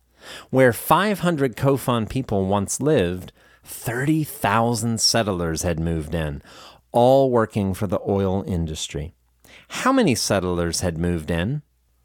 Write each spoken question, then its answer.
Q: How many settlers had moved in?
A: 30,000 settlers had moved in.